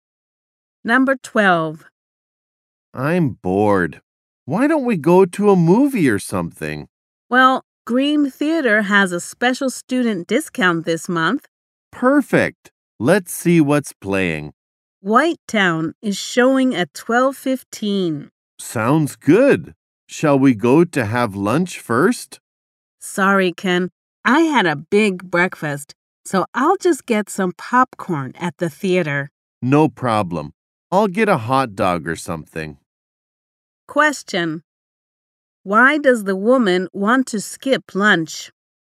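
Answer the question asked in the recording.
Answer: She had a big breakfast.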